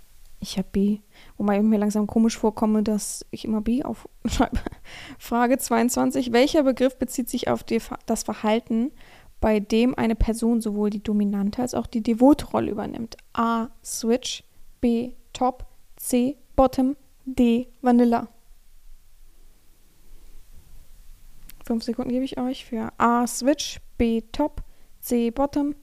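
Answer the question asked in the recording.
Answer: A: Switch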